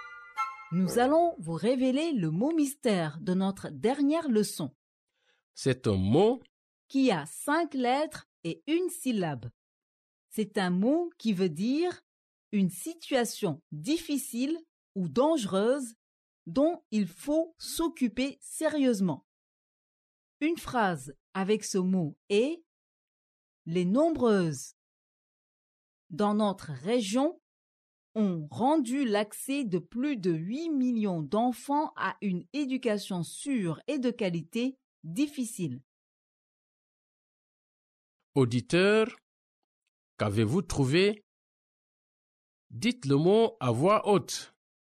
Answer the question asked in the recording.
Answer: Le mot mystère d'aujourd'hui est crise.